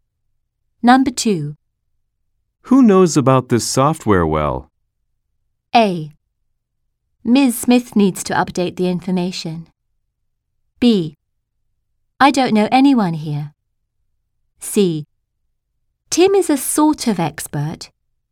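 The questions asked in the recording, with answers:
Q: Who knows about this software well?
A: C: Tim is a sort of expert.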